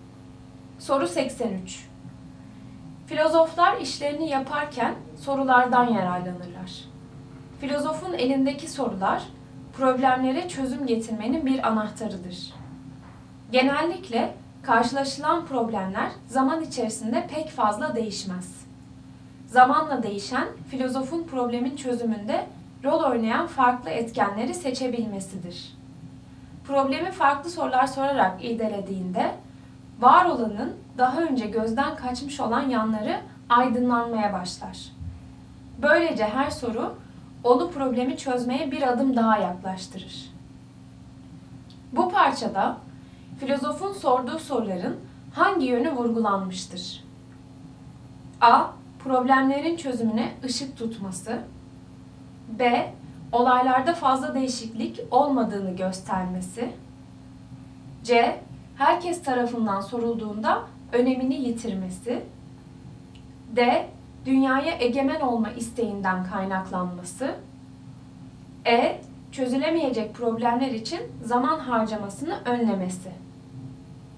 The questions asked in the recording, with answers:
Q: Bu parçada, filozofun sorduğu soruların hangi yönü vurgulanmıştır?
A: Doğru cevap A. Problemlerin çözümüne ışık tutması.